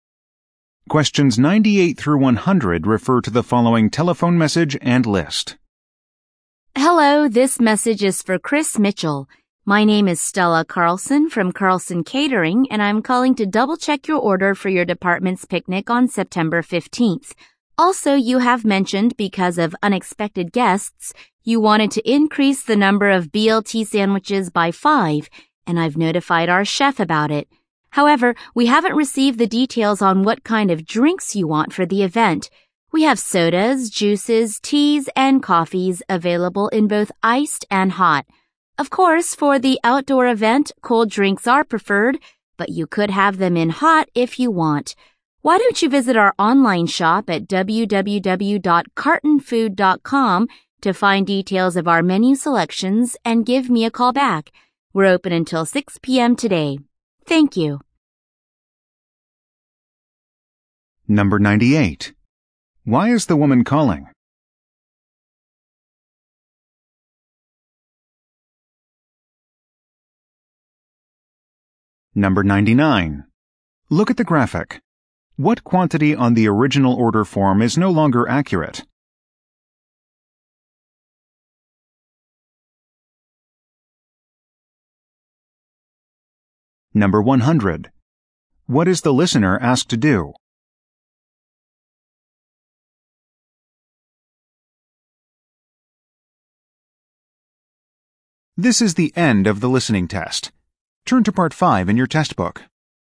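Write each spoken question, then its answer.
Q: Why is the woman calling?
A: To double-check the picnic catering order

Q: What is the listener asked to do?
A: Visit the online shop and call her back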